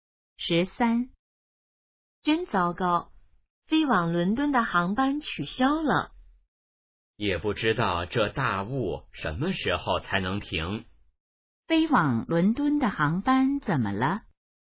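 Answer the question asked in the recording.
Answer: 取消了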